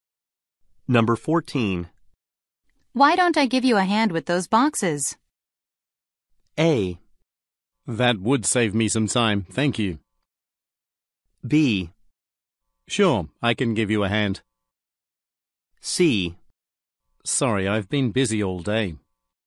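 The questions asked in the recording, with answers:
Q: Why don't I give you a hand with those boxes?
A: A: That would save me some time, thank you.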